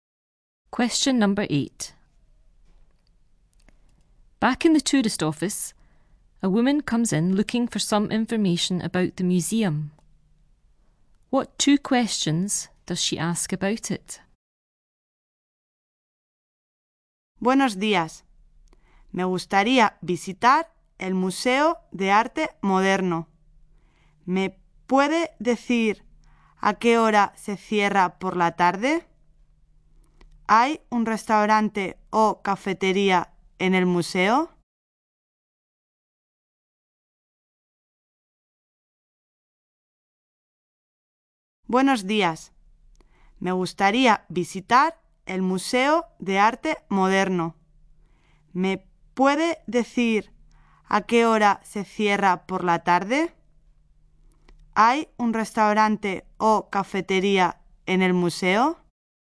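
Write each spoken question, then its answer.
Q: What 2 questions does she ask about it?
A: What time it closes in the afternoon/evening, and whether there is a restaurant or cafeteria in the museum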